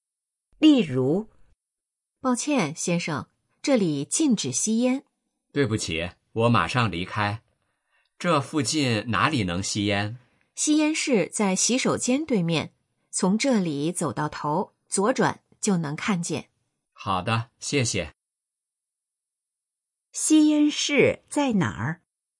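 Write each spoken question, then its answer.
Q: 吸烟室在哪儿?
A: 在洗手间对面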